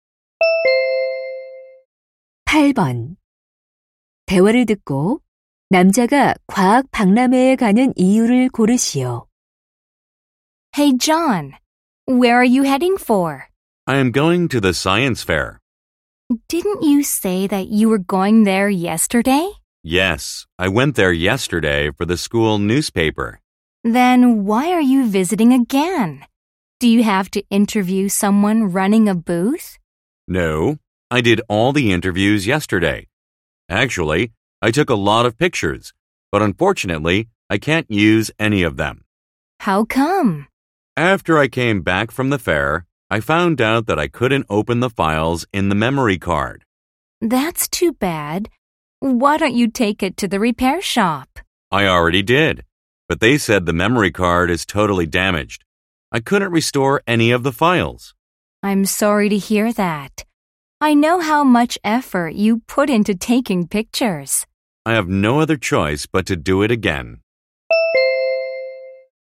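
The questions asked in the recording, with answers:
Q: 대화를 듣고 남자가 과학 박람회에 가는 이유를 고르시오.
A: 사진을 다시 찍기 위해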